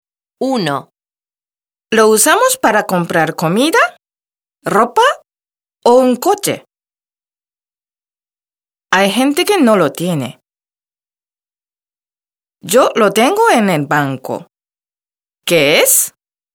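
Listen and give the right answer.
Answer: el dinero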